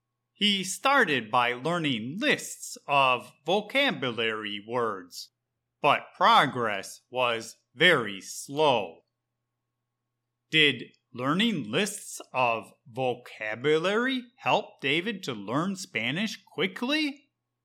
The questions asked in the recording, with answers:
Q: Did learning lists of vocabulary help David to learn Spanish quickly?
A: No. David was learning very slowly.